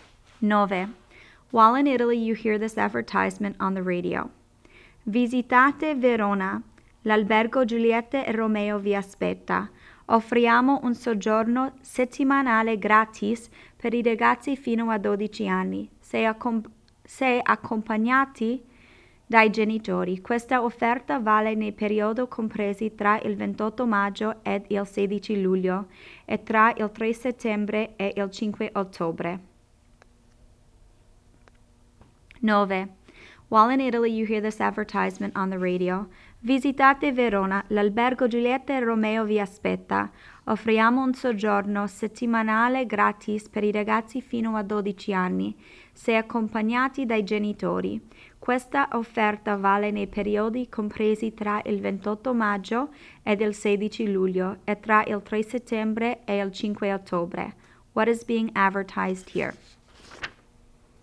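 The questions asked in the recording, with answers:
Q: What is being advertised here?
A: A hotel in Verona offering children up to 12 a free week's stay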